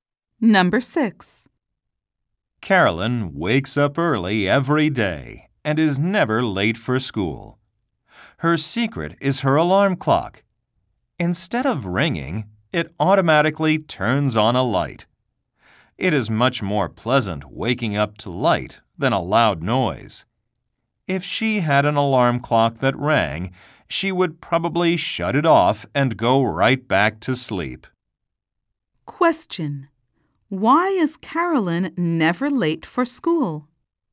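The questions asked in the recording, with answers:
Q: Why is Carolyn never late for school?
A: Her alarm clock wakes her with light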